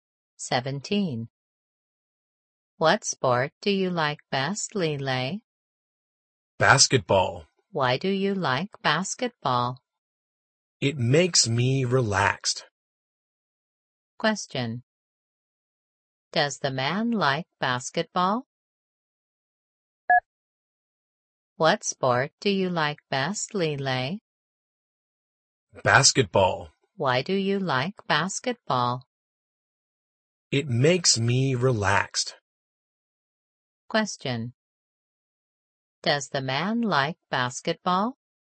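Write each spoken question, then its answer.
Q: Does the man like basketball?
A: Yes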